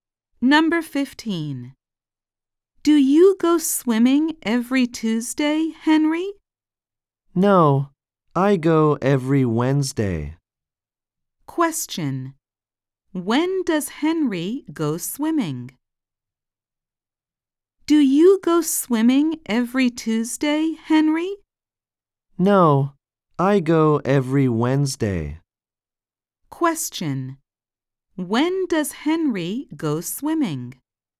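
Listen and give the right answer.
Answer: Every Wednesday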